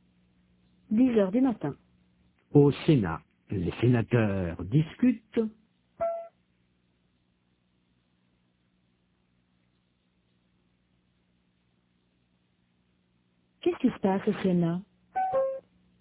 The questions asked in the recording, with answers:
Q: Qu'est-ce qui se passe au Sénat?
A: Les sénateurs discutent.